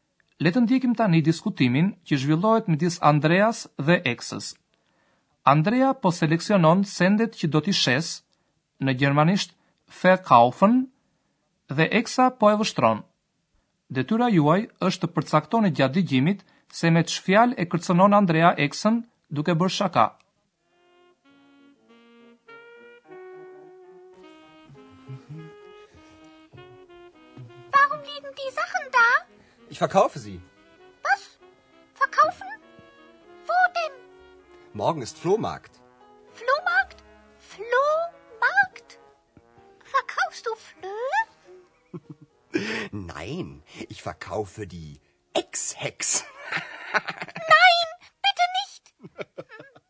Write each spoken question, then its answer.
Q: Detyra juaj është të përcaktoni gjatë dëgjimit se me çfjalë e kërcenon Andrea Eksën duke bërë shaka.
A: Andrea e kërcënon eksën se do ta shësë edhe atë, si sendet e përdorura sigurisht këta i e thot me shaka.